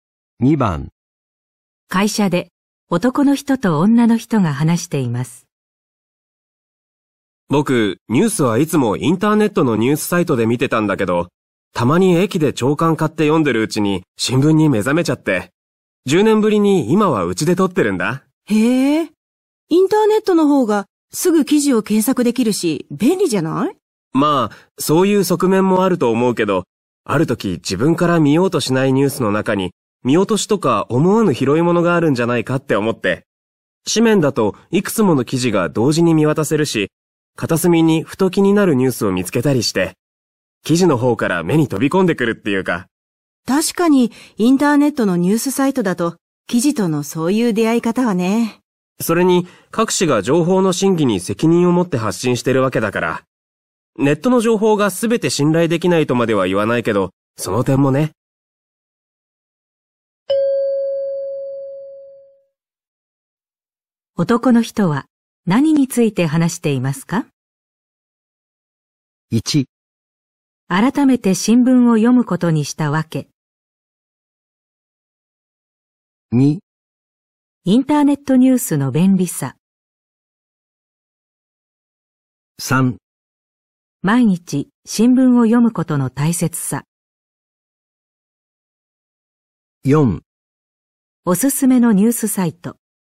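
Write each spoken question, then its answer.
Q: 男の人は何について話していますか?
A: 1: 改めて新聞を読むことにしたわけ。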